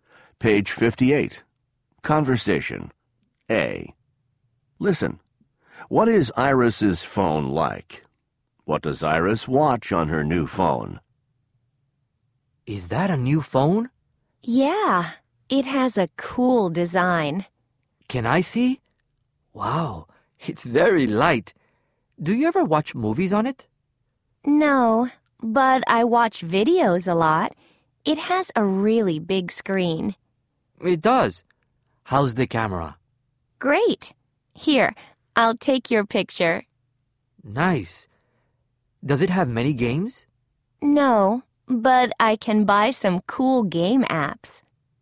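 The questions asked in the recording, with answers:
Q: What is Iris's phone like?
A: It has a cool design, it's very light, has a really big screen and a great camera.

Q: What does Iris watch on her new phone?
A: Videos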